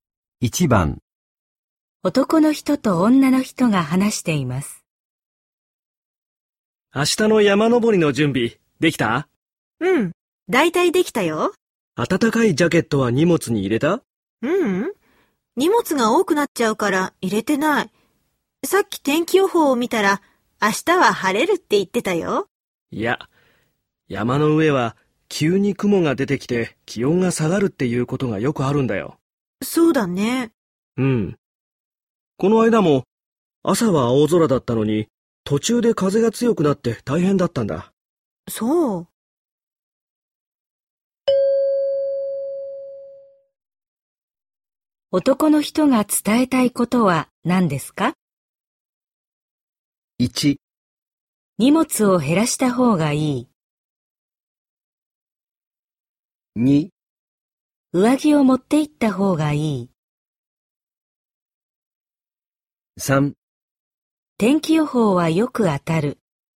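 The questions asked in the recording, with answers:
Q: 男の人が伝えたいことは何ですか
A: 2: 上着を持って行った方がいい。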